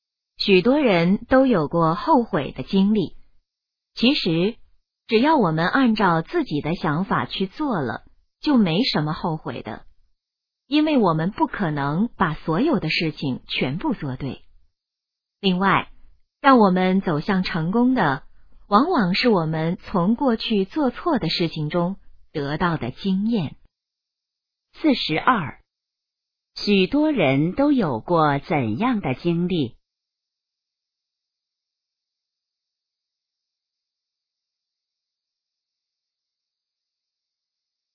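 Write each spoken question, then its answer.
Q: 许多人都有过怎样的经历?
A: 后悔的经历

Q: 什么能帮助我们走向成功?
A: 从过去做错的事情中得到的经验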